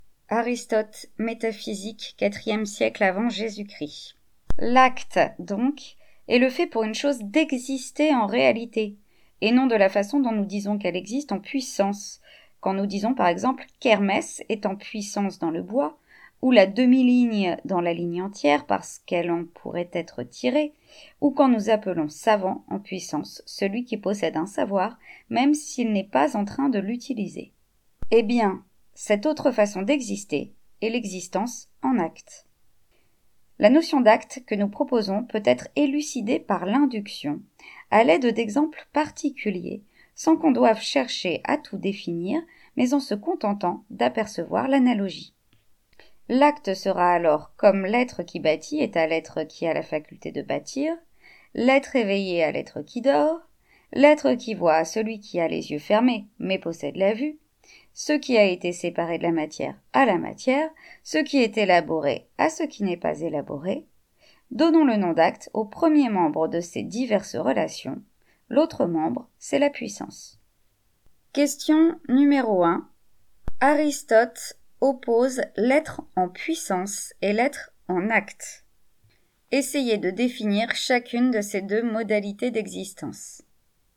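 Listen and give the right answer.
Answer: L'être en acte est ce qui existe en réalité ; l'être en puissance est ce qui pourrait exister ou le devenir, sans l'être encore effectivement (comme Hermès dans le bois).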